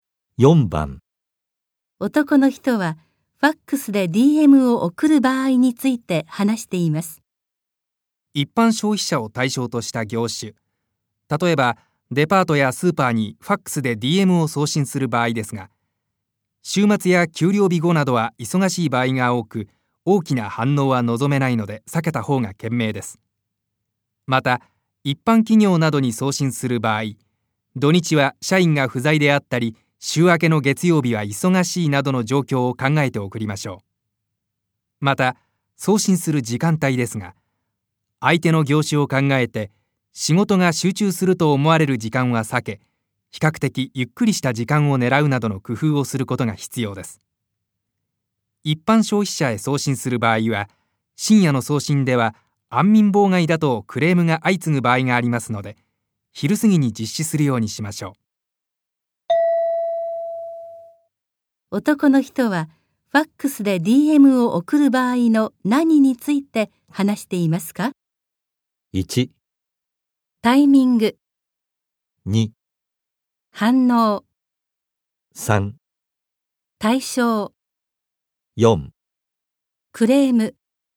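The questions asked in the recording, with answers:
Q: 男の人はファックスで DM を送る場合の何について話していますか?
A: 1: タイミング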